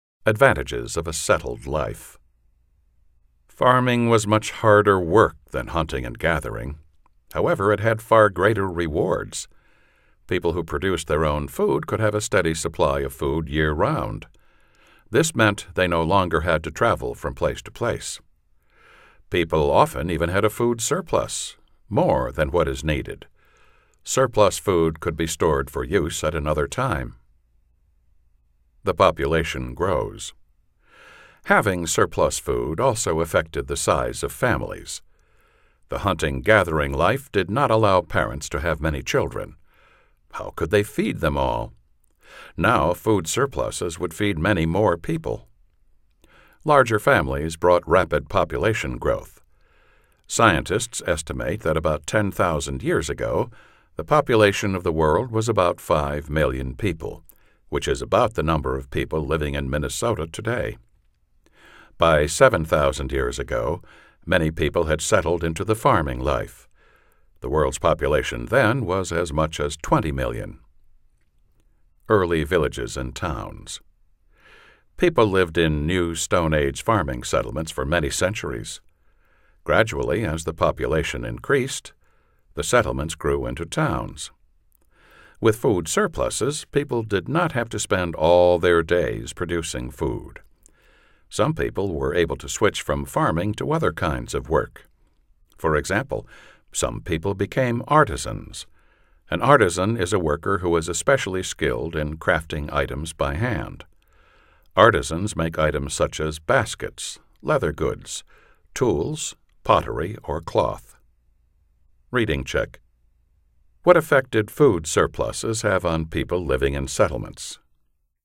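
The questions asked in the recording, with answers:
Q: What effect did food surpluses have on people living in settlements?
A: People no longer had to spend all their time producing food, so some switched to other work, such as becoming artisans.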